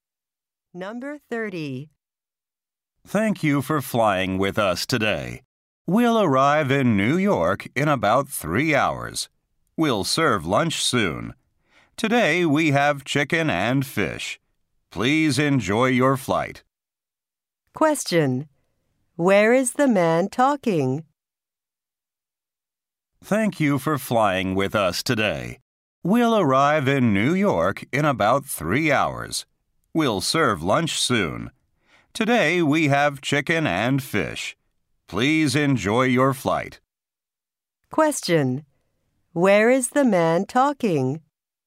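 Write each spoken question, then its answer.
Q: Where is the man talking?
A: On a plane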